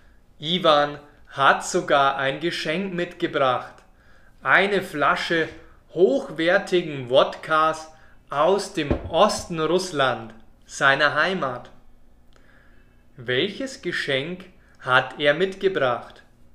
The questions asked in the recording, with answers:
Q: Welches Geschenk hat er mitgebracht?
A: Eine Flasche Wodka aus seiner Heimat.